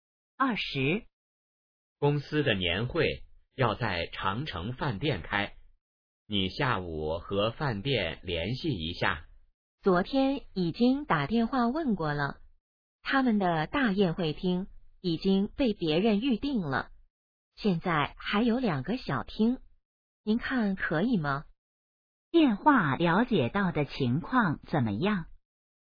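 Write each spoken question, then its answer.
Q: 电话了解到的情况怎么样?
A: 大宴会厅已被预定,只有2个小厅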